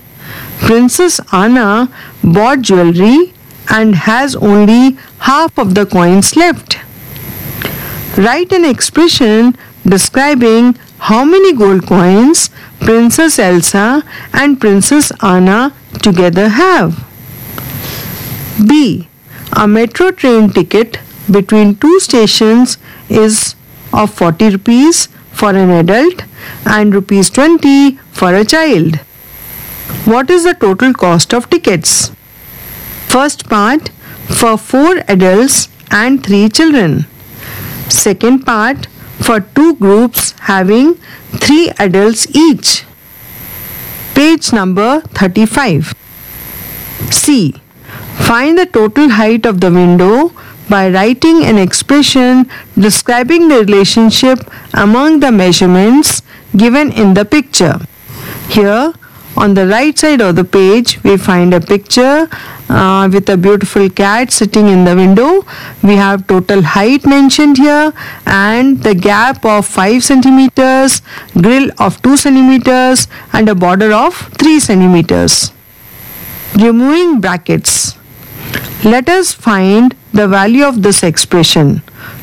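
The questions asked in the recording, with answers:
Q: Write an expression describing how many gold coins Princess Elsa and Princess Anna together have.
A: 2 × 100 + 100 ÷ 2 = 250 gold coins

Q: Second part, for 2 groups having 3 adults each.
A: 2 × (3 × 40) = 240 rupees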